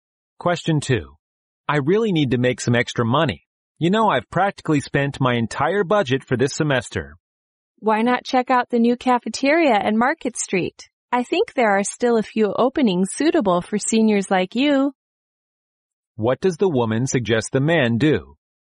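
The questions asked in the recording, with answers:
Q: What does the woman suggest the man do?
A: Apply for a job at the new cafeteria on Market Street.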